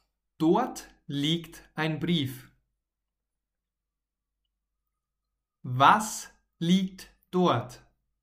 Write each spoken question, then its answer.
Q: Was liegt dort?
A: ein Brief. In der Küche liegt ein Brief.